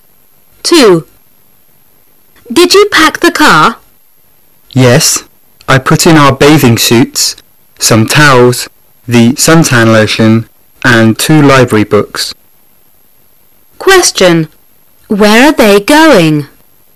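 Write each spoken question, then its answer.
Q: Where are they going?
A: To the beach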